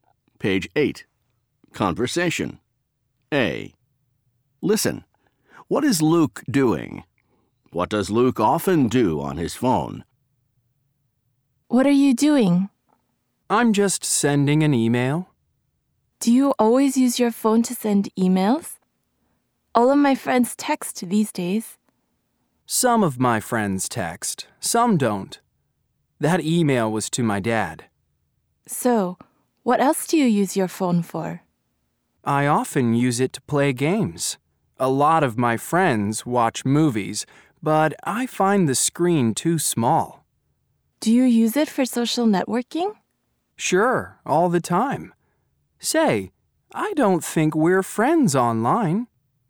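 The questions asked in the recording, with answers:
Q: What is Luke doing?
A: Sending an email

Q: What does Luke often do on his phone?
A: Plays games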